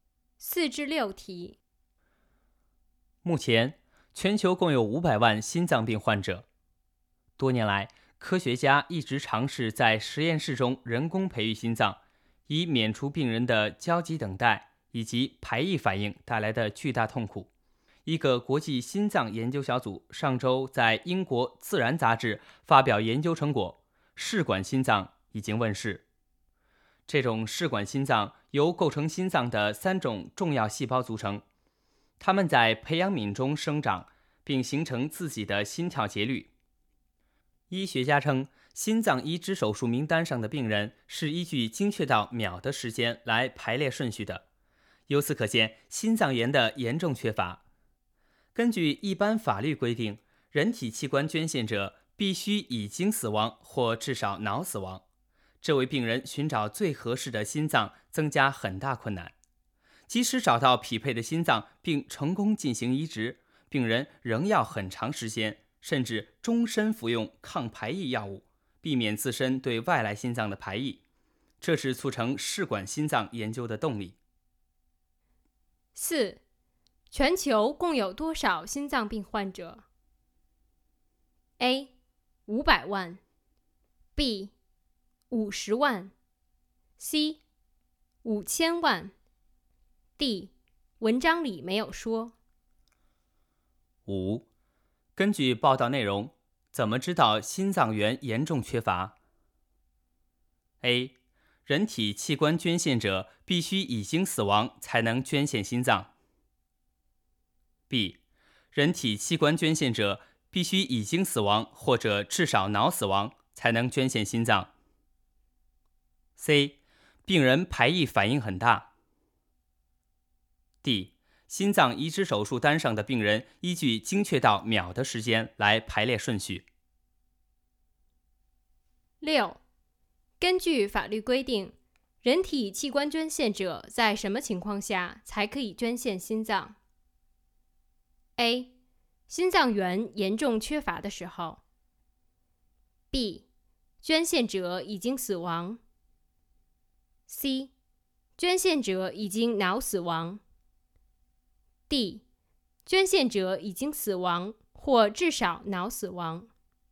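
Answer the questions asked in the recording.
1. A: 500万。
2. D: 心脏移植手术单上的病人依据精确到秒的时间来排列顺序。
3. D: 捐献者已经死亡或至少脑死亡。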